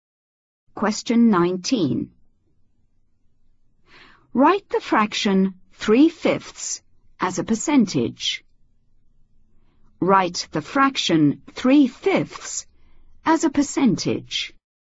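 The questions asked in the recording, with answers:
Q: Write the fraction 3/5 as a percentage.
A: 60%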